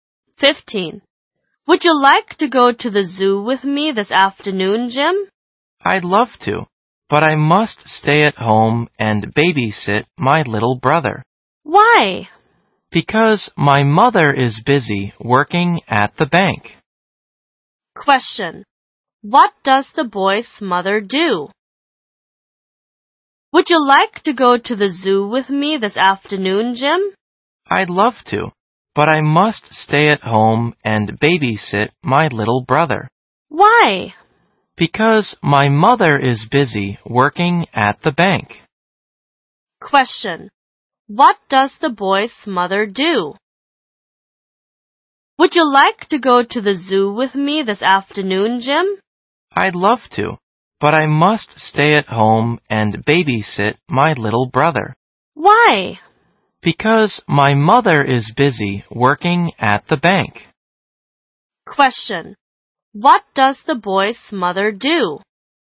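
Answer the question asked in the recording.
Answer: She works at a bank.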